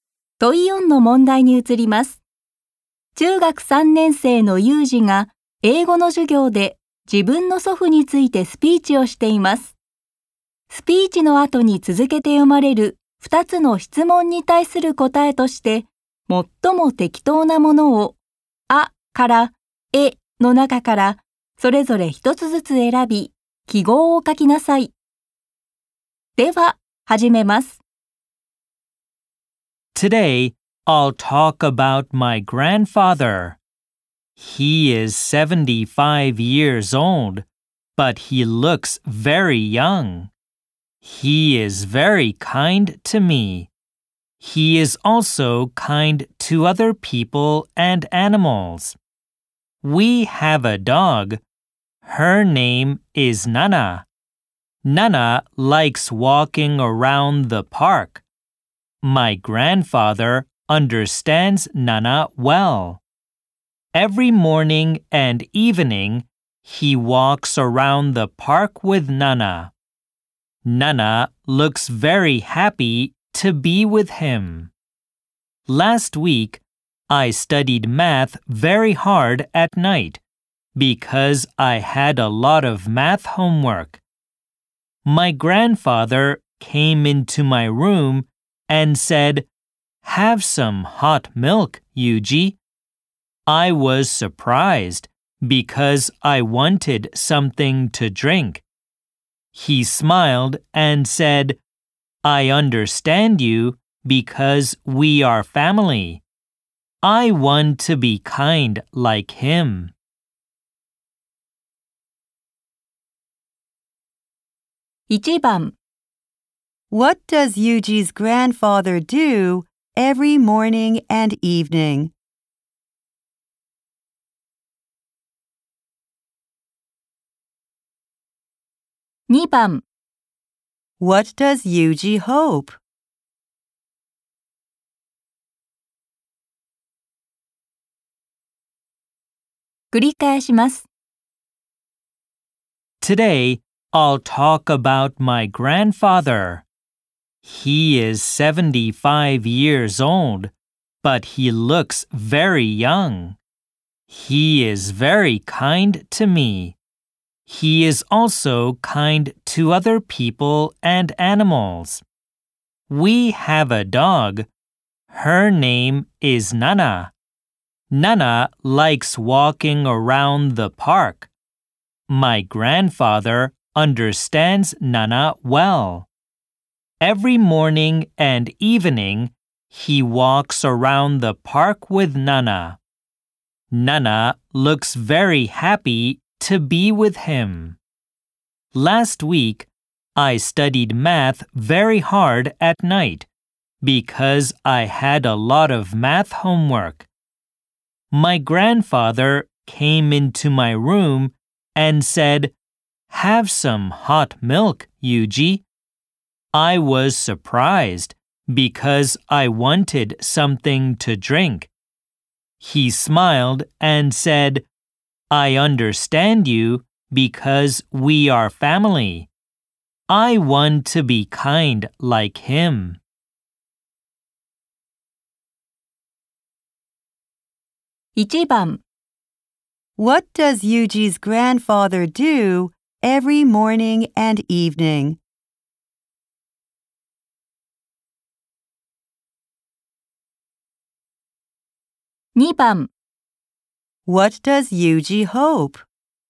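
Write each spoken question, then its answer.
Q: What does Yuji's grandfather do every morning and evening?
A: He walks around the park with Nana.

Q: What does Yuji hope?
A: To be kind like his grandfather.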